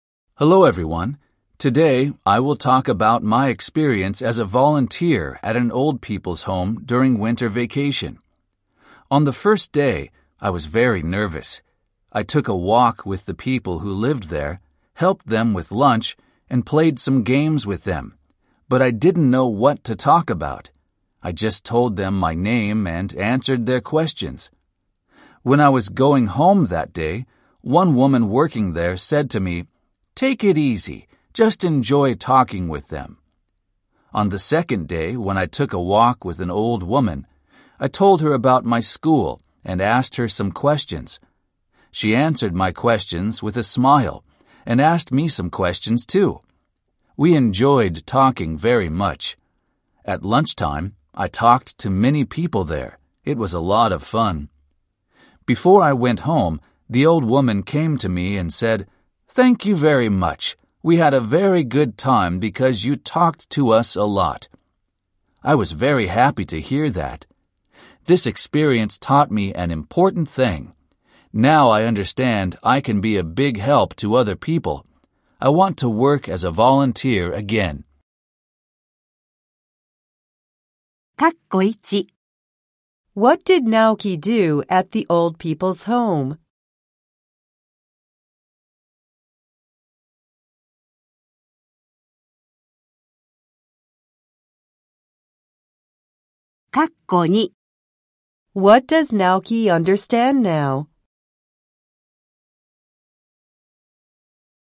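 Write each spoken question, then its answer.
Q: What does Naoki understand now?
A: He can be a big help to other people.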